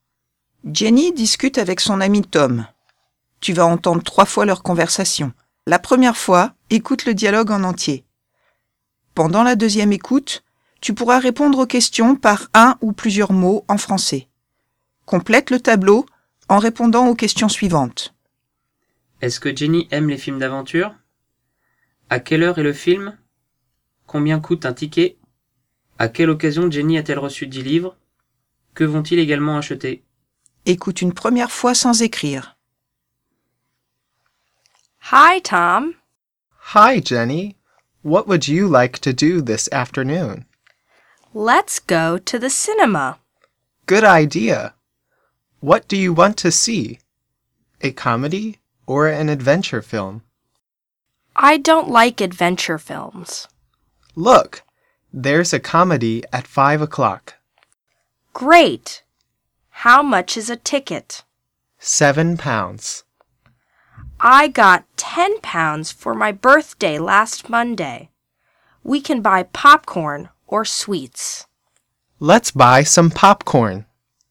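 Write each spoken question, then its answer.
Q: Est-ce que Jenny aime les films d'aventure?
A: Non

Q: À quelle heure est le film?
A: À 5 heures (17 h)

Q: Combien coûte un ticket?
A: 7 livres

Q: À quelle occasion Jenny a-t-elle reçu 10 livres?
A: Pour son anniversaire

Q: Que vont-ils également acheter?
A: Du pop-corn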